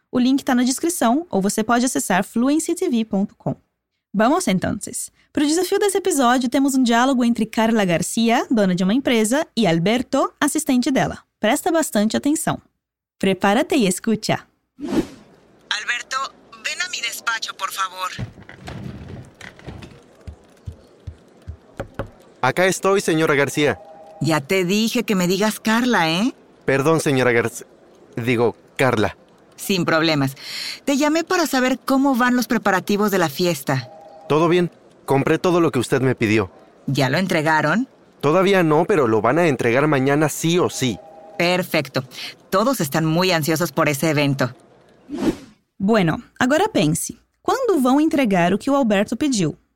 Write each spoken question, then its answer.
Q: ¿Cuándo van a entregar lo que Alberto pidió?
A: Amanhã, né?